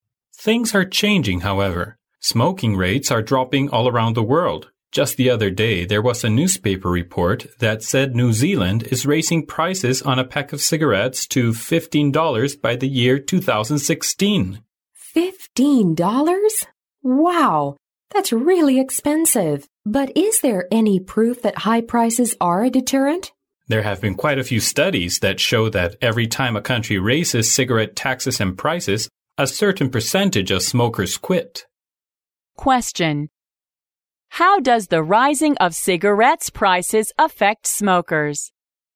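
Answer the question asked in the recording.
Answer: A certain percentage of smokers quit

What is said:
[听力原文] M: Things are changing, however. Smoking rates are dropping all around the world. Just the other day there was a newspaper report that said New Zealand is raising prices on a pack of cigarettes to US $15 by the year 2016! Wow! That's really expensive. But is there any proof that high prices are a deterrent? M: There have been quite a few studies that show that every time a country raises cigarette taxes and prices, a certain percentage of smokers quit. Question: How does the rising of cigarettes prices affect smokers?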